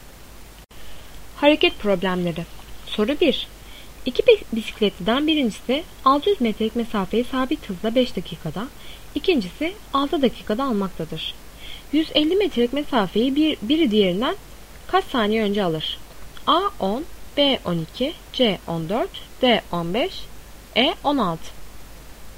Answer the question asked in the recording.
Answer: Doğru cevap D 15.